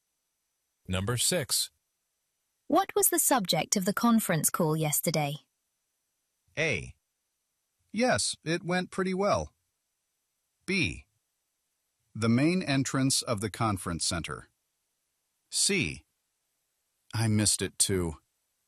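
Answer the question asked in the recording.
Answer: C: I missed it too.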